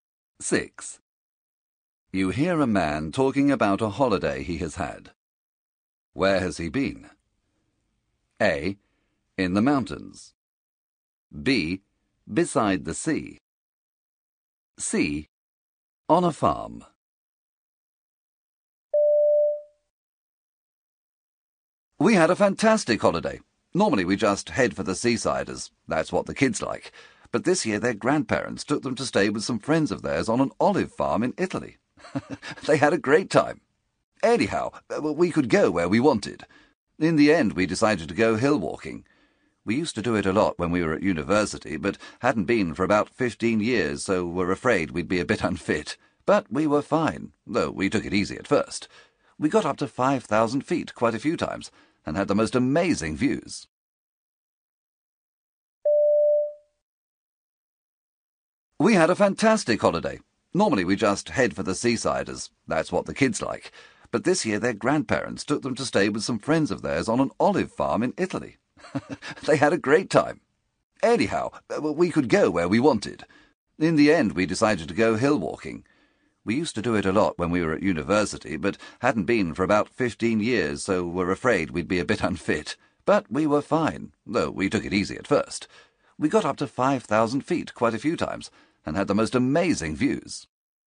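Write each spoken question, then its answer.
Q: Where has he been?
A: A: In the mountains.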